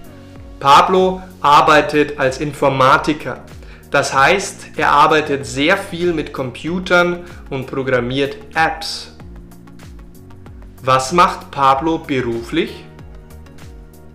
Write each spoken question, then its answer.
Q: Was macht Pablo beruflich?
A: Er arbeitet als Informatiker.